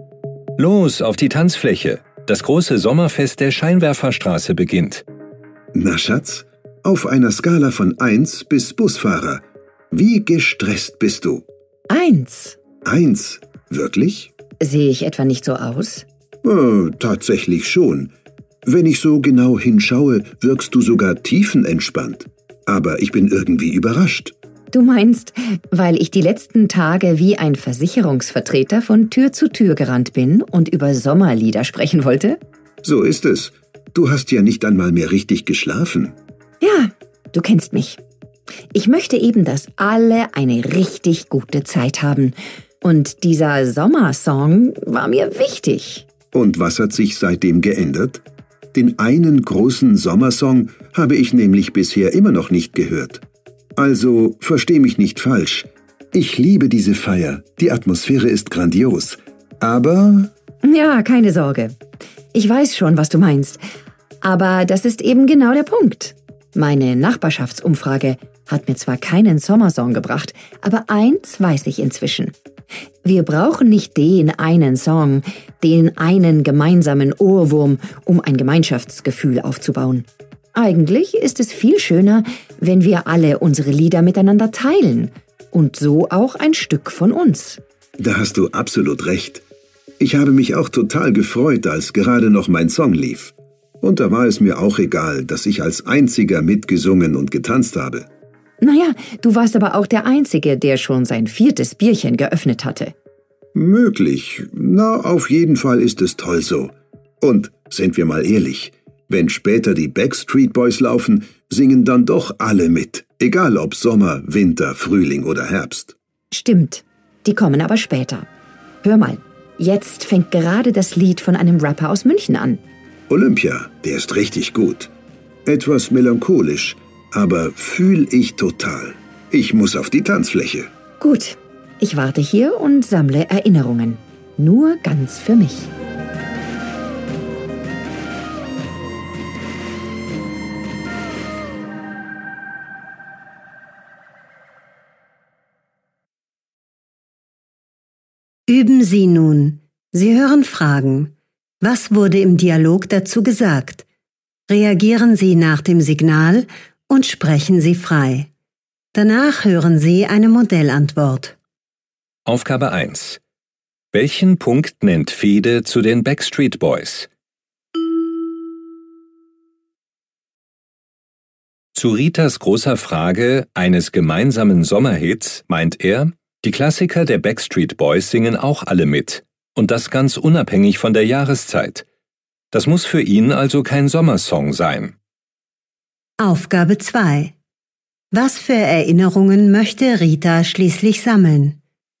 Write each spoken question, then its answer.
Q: Was für Erinnerungen möchte Rita schließlich sammeln?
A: Rita möchte schließlich nur noch die Feier genießen und dabei ihre ganz eigenen besonderen Erinnerungen machen.